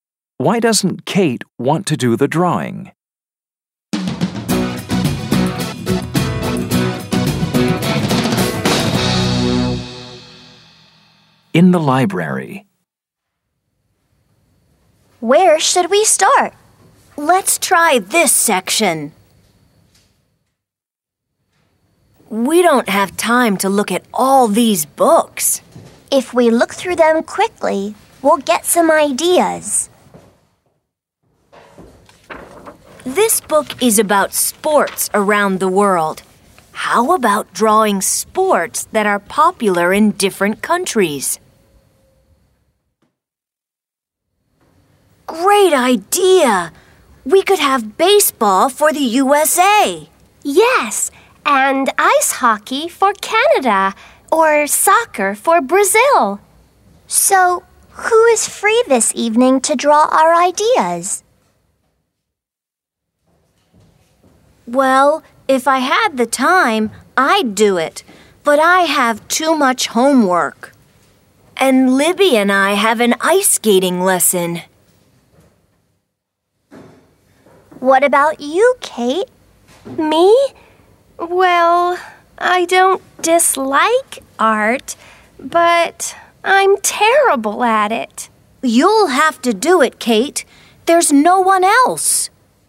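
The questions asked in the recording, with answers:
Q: Why doesn't Kate want to do the drawing?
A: Because she's terrible at art.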